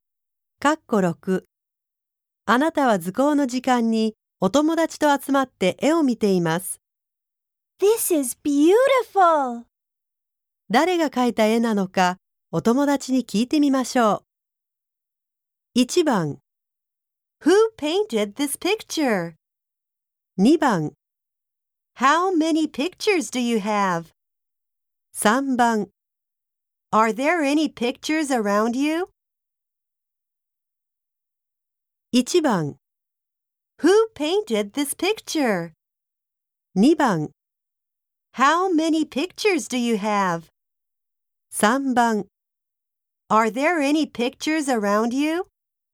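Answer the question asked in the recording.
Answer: 1: Who painted this picture?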